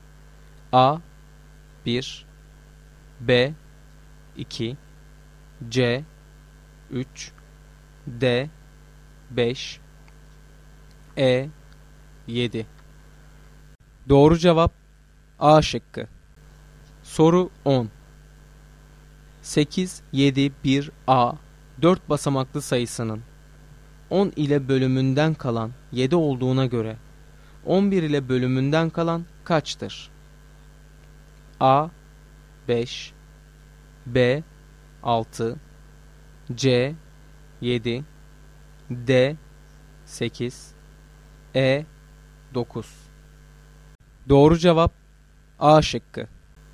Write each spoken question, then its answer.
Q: 8, 7, 1, A 4 basamaklı sayısının 10 ile bölümünden kalan 7 olduğuna göre 11 ile bölümünden kalan kaçtır?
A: Doğru cevap A şıkkı.